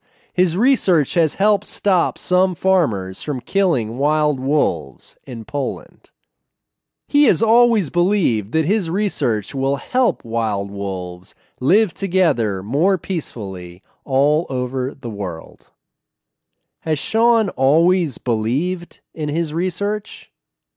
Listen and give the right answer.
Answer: Yes, he has always believed that his research will help wild wolves.